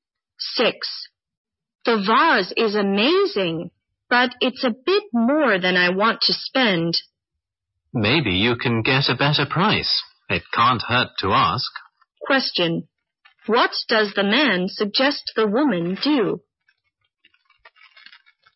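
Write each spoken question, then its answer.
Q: What does the man suggest the woman do?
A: Ask for a lower price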